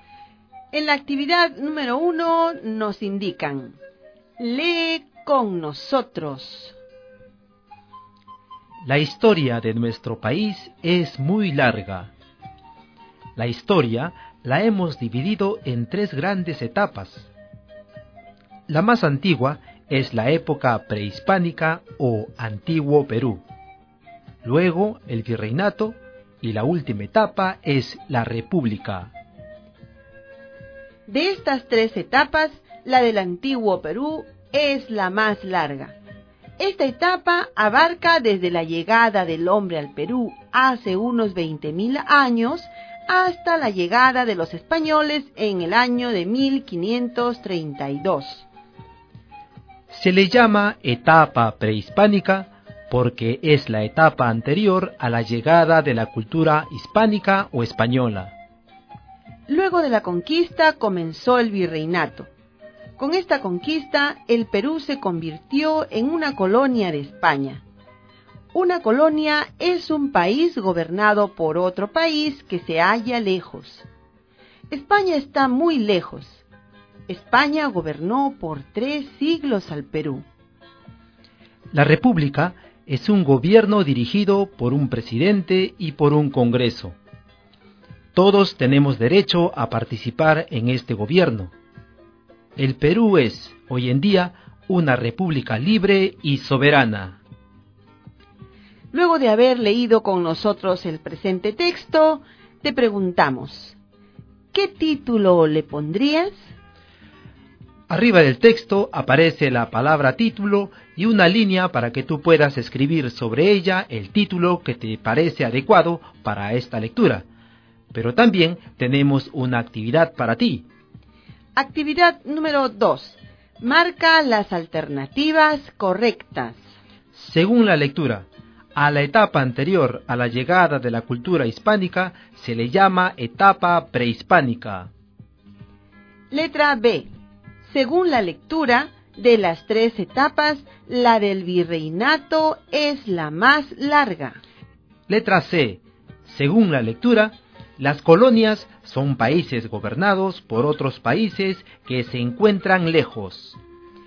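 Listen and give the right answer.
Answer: A: a la etapa anterior a la llegada de la cultura hispánica se le llama etapa prehispánica; C: las colonias son países gobernados por otros países que se encuentran lejos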